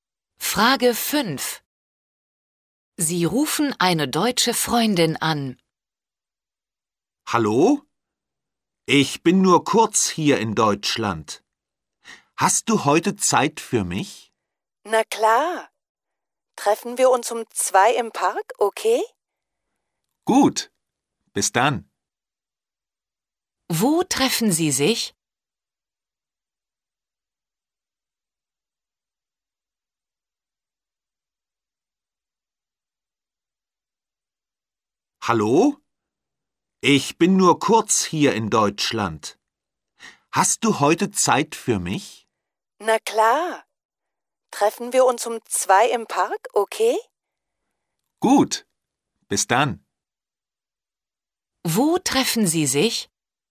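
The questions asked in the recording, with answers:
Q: Wo treffen Sie sich?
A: im Park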